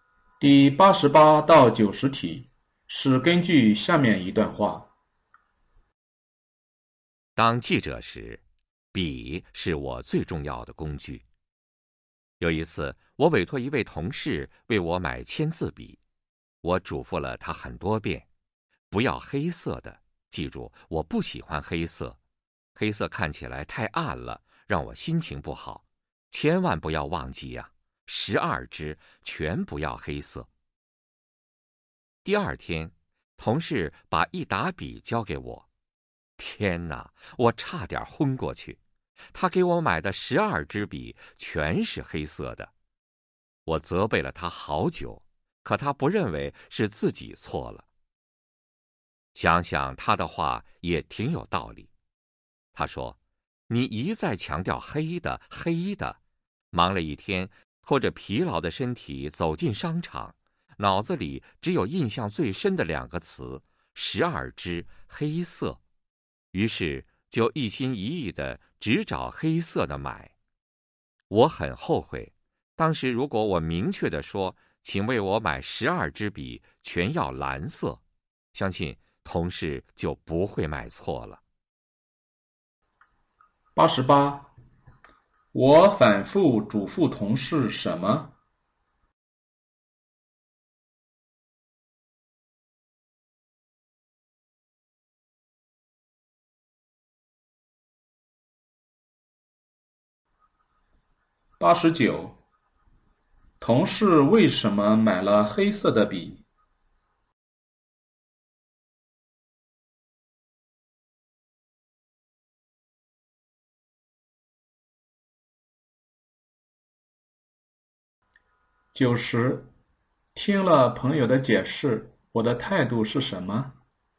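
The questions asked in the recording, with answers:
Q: 我反复嘱咐同事什么?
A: 不要买黑色的笔

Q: 同事为什么买了黑色的笔?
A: 他很累,脑子里只记住了"12支黑色"

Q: 听了朋友的解释,我的态度是什么?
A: 觉得他有道理,很后悔自己没说清楚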